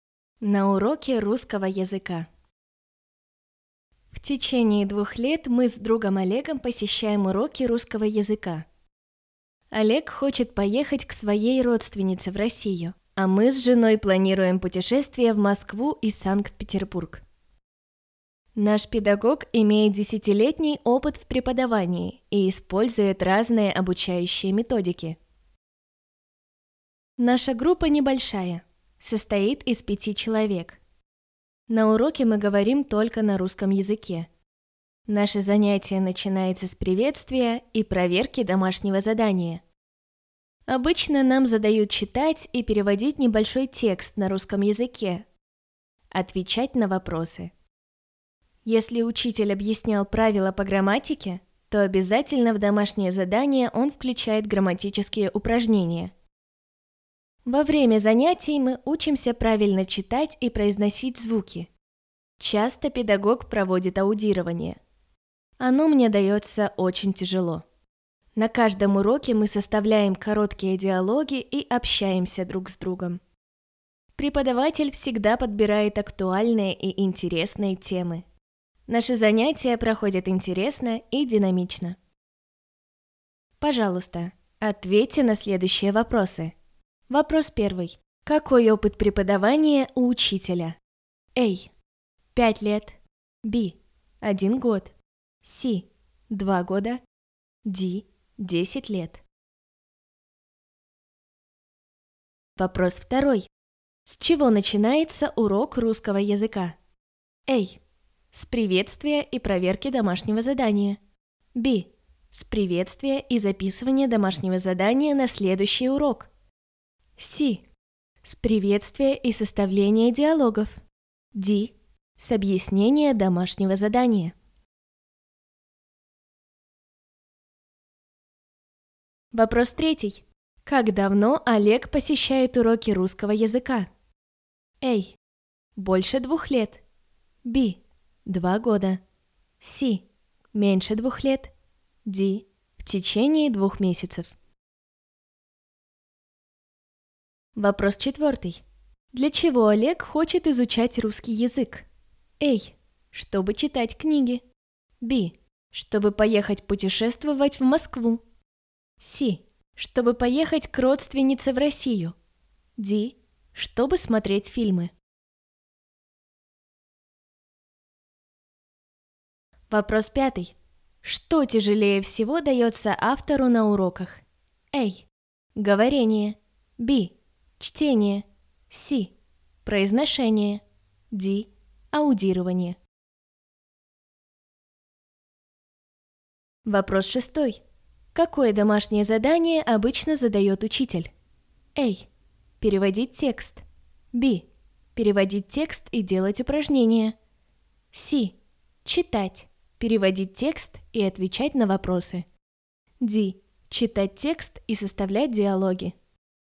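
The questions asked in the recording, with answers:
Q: Какой опыт преподавания у учителя?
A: D: 10 лет.

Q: С чего начинается урок русского языка?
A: A: С приветствия и проверки домашнего задания.

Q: Как давно Олег посещает уроки русского языка?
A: Б: 2 года.

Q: Для чего Олег хочет изучать русский язык?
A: C: Чтобы поехать к родственнице в Россию.

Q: Что тяжелее всего дается автору на уроках?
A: Д: Аудирование.

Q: Какое домашнее задание обычно задает учитель?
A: С: Читать. Переводить текст и отвечать на вопросы.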